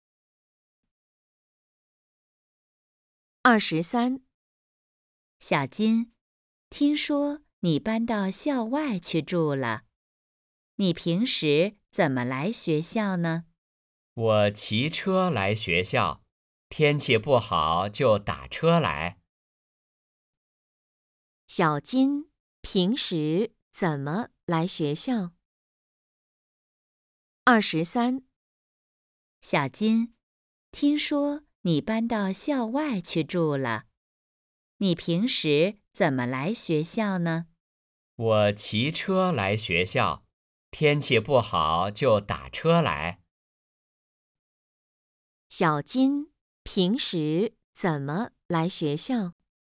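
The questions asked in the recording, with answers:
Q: 小金平时怎么来学校?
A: 骑车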